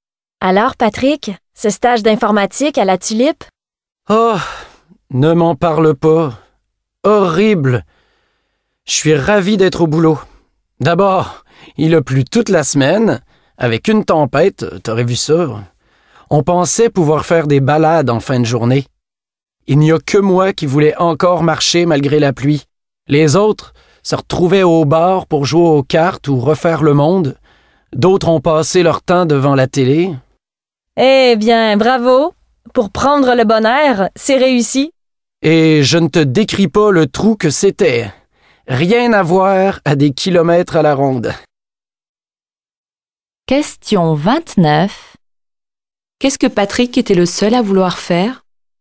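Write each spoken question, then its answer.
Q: Qu'est-ce que Patrick était le seul à vouloir faire?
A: Marcher (se promener) malgré la pluie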